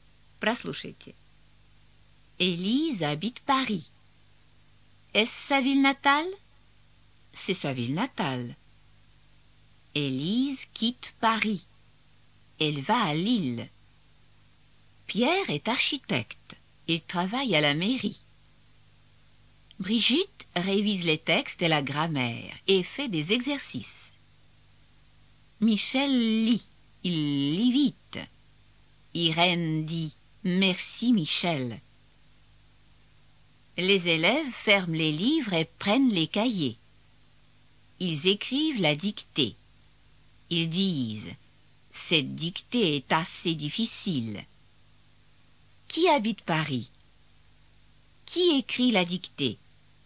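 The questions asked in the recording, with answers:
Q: Qui habite Paris?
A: Élise

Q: Qui écrit la dictée?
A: Les élèves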